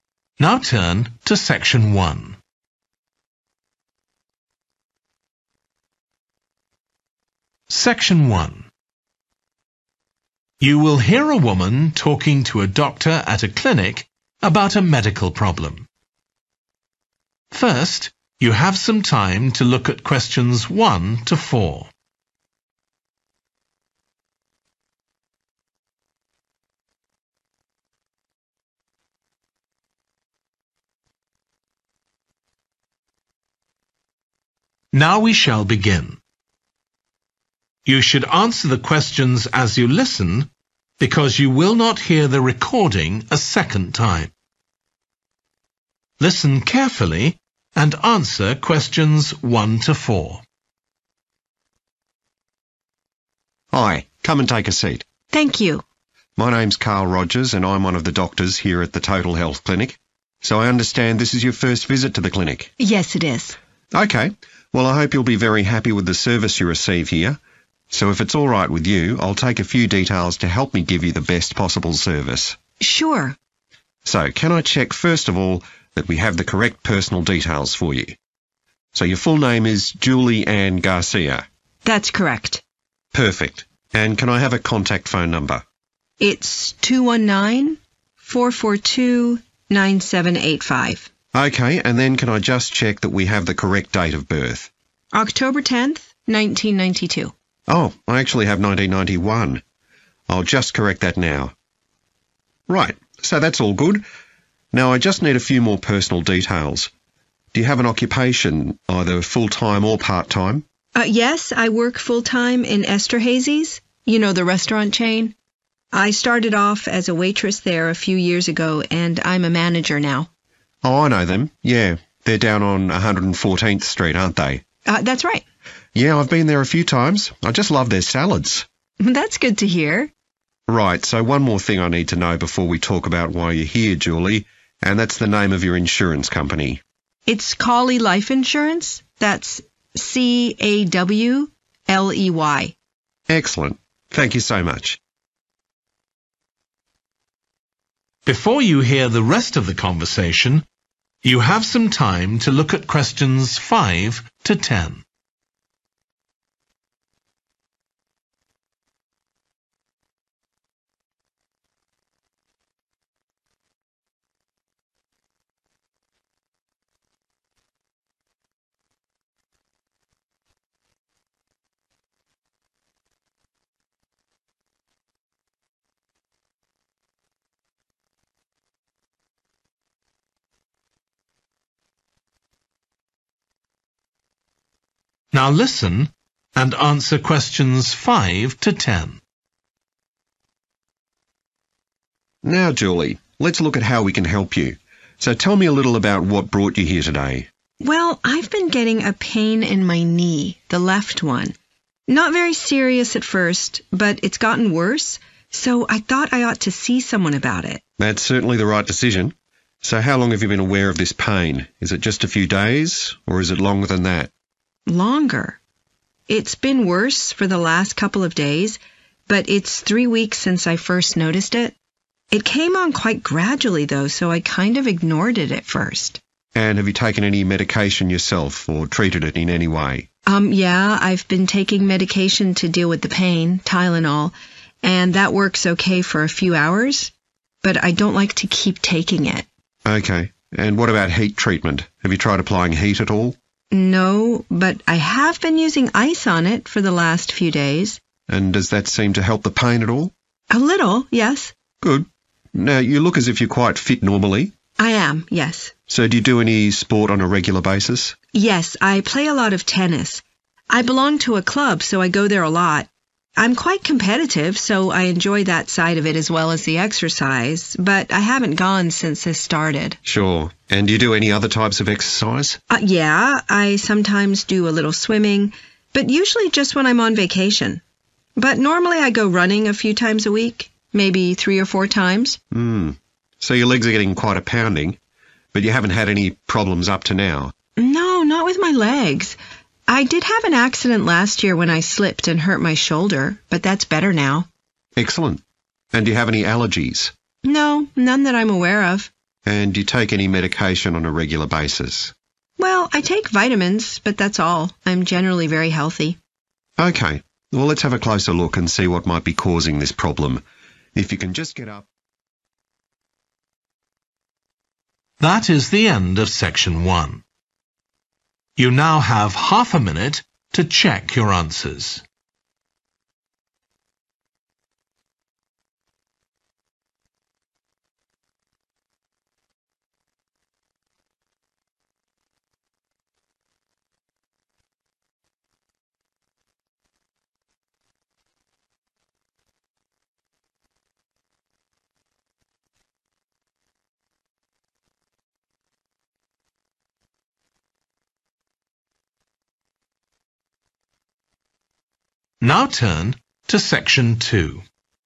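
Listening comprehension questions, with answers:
Complete the notes below. Write ONE WORD AND/OR A NUMBER for each answer.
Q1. Contact phone: (1)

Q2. Date of birth: (2) , 1992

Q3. Occupation works as a: (3)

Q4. Insurance company: (4) Life insurance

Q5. Type of problem: pain in her left (5)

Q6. When it began: (6) ago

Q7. belongs to a (7) club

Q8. goes (8) regularly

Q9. injured her (9) last year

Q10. no regular medication apart from (10)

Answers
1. 219-442-9785
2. October 10th
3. manager
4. Cawley
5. knee
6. 3 weeks
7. tennis
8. running
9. shoulder
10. vitamins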